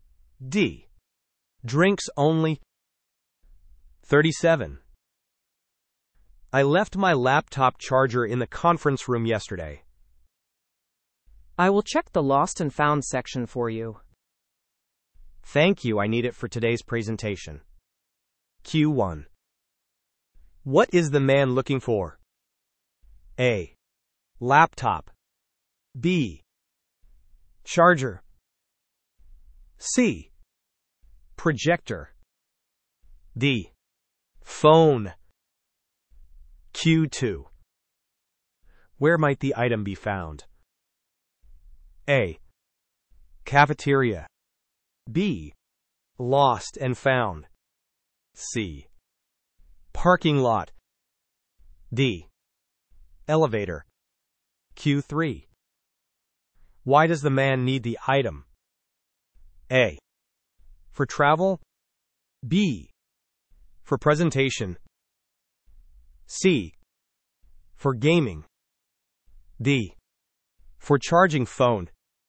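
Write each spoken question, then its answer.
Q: What is the man looking for?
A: B: Charger.

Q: Where might the item be found?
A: B: Lost and found.

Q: Why does the man need the item?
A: B: For presentation.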